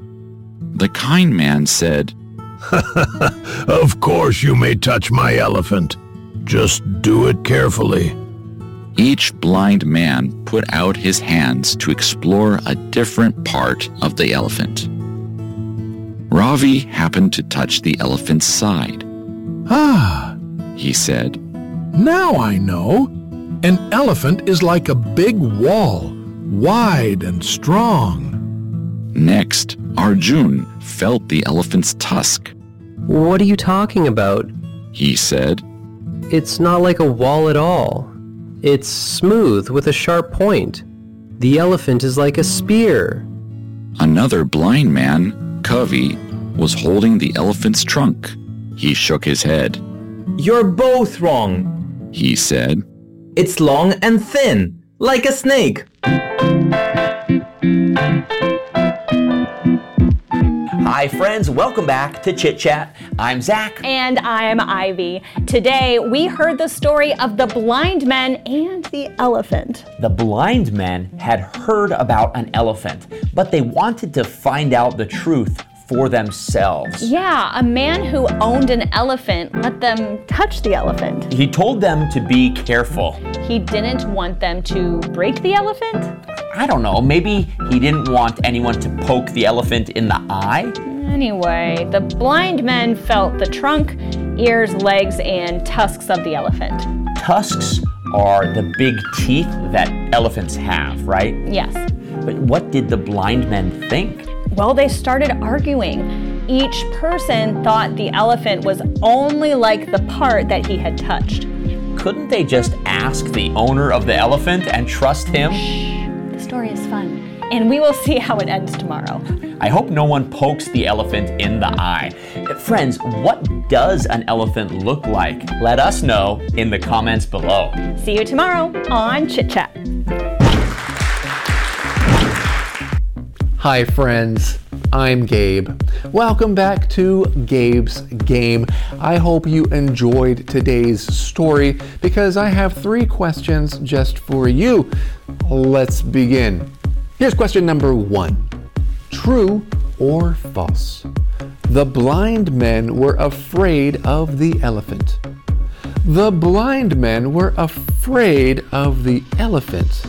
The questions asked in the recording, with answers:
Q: True or false? The blind men were afraid of the elephant.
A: So if you answered false, that's correct.